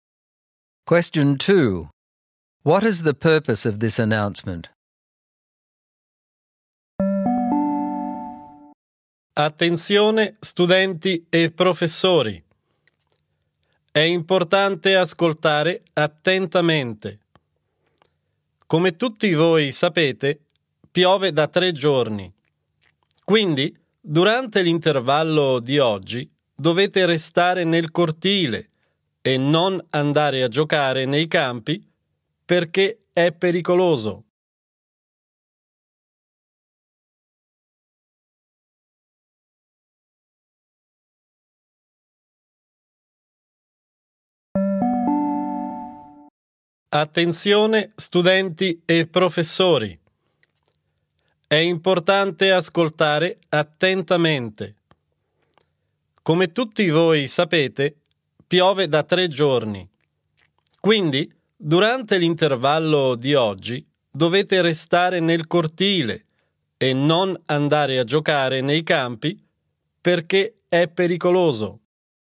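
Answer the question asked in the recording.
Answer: To tell students that they must stay in the courtyard during today's break and not play on the fields, because the rain has made them dangerous.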